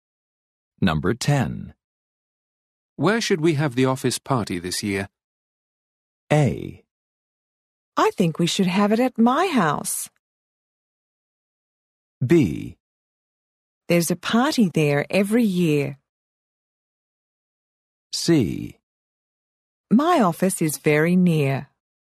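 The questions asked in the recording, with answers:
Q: Where should we have the office party this year?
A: A: I think we should have it at my house.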